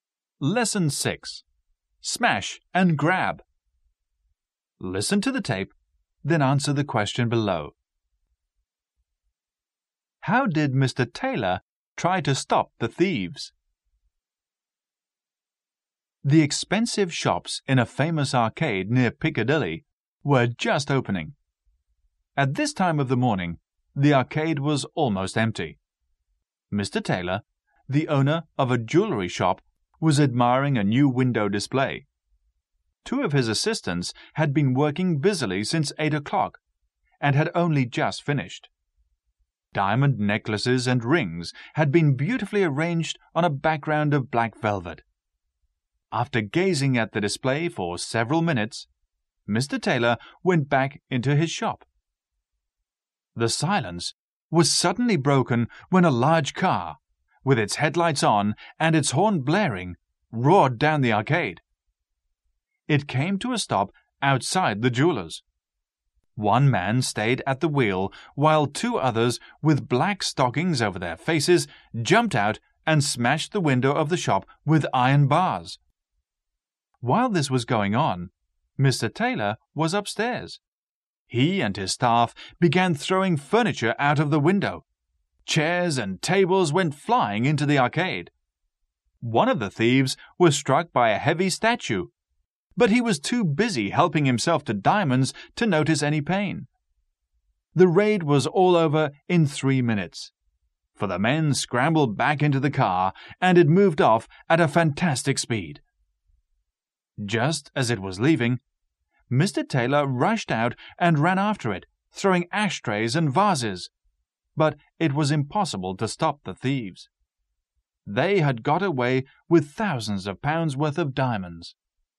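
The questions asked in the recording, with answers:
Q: How did Mr. Taylor try to stop the thieves?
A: He and his staff threw furniture out of the window, and he ran after the car throwing ashtrays and vases.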